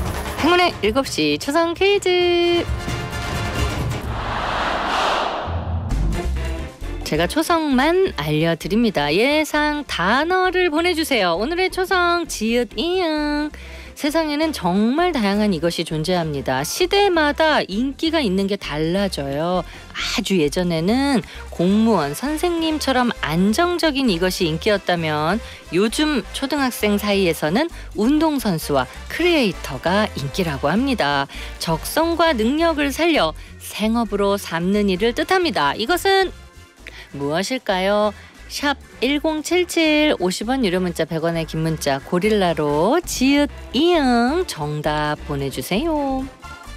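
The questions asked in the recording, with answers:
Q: 이것은 무엇일까요?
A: 직업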